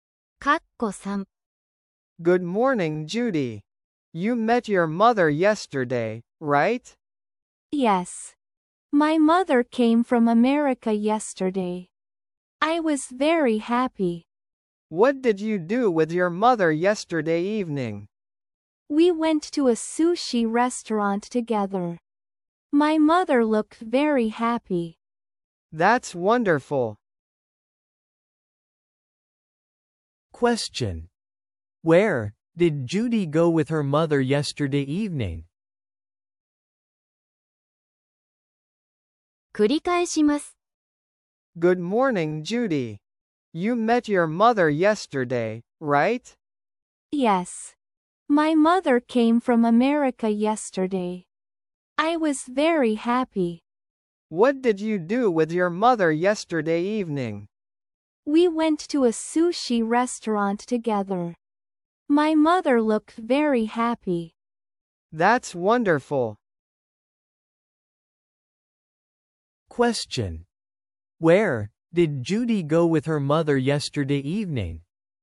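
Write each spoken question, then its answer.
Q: Where did Judy go with her mother yesterday evening?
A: To a sushi restaurant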